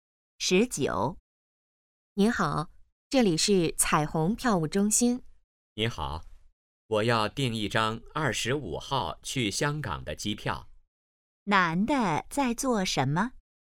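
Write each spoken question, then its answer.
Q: 男的在做什么?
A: 订机票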